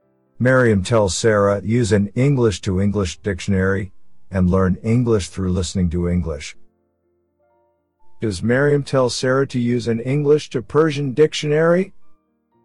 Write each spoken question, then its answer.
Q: Does Miriam tell Sarah to use an English to Persian dictionary?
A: No, she doesn't. She tells her to use an English to English dictionary.